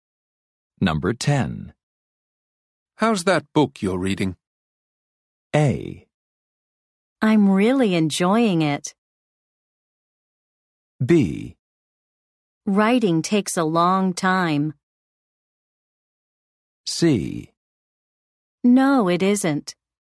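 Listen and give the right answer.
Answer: A: I'm really enjoying it.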